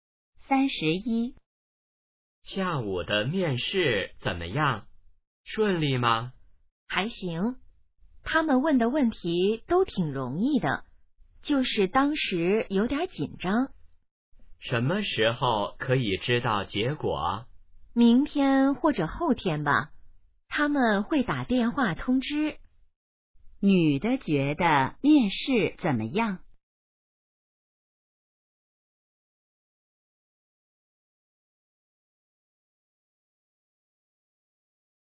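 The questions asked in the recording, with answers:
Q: 女的觉得面试怎么样?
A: 问题挺容易,但有点紧张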